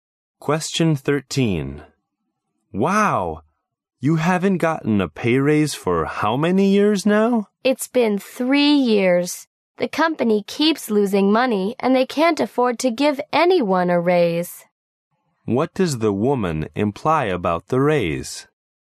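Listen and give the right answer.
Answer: The company can't afford to give anyone a raise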